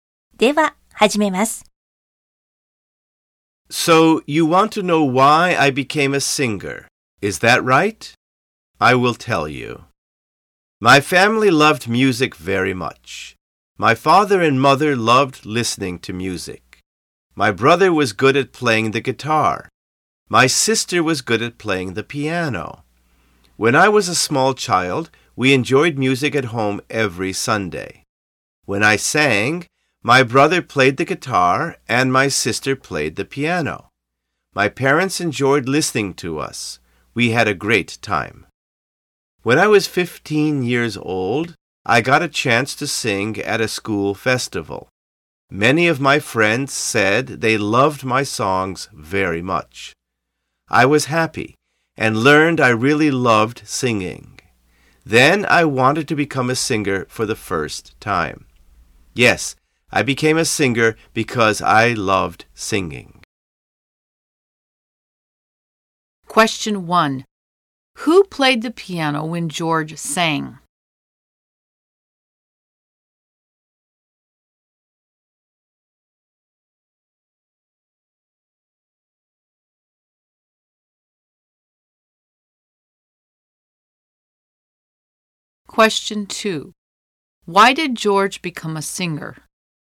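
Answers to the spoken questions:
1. His sister did.
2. Because he loved singing.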